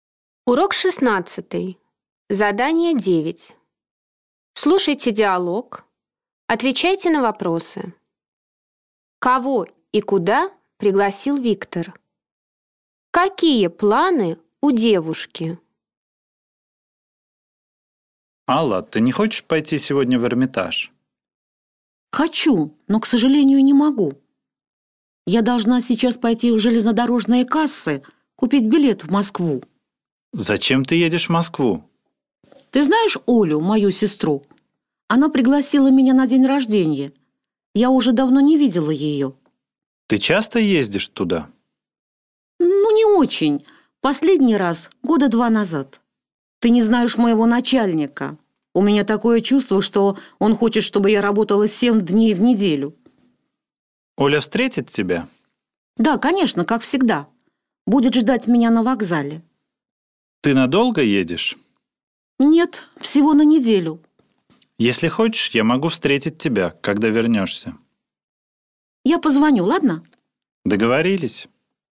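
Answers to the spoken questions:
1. Аллу в Эрмитаж
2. Купить билет и поехать в Москву к сестре Оле на день рождения на неделю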